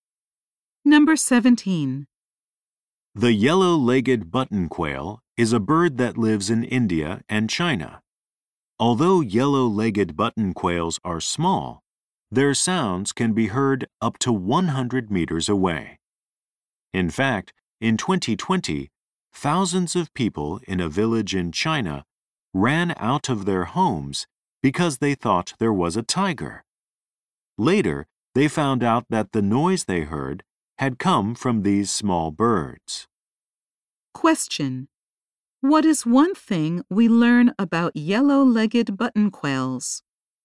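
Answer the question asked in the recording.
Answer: Their sounds can be heard up to 100 meters away.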